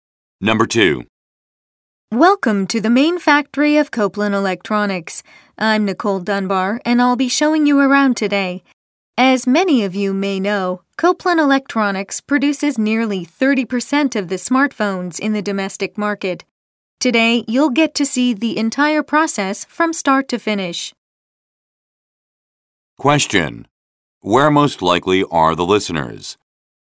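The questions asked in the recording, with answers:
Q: Where most likely are the listeners?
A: At a factory (Copeland Electronics)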